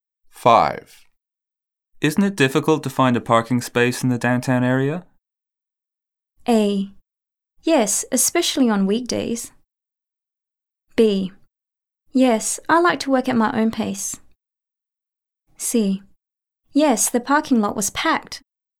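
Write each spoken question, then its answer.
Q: Isn't it difficult to find a parking space in the downtown area?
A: A: Yes, especially on weekdays.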